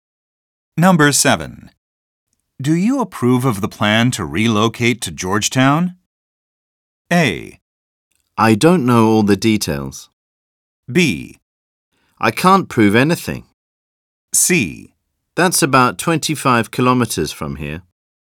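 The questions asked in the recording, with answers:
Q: Do you approve of the plan to relocate to Georgetown?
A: A: I don't know all the details.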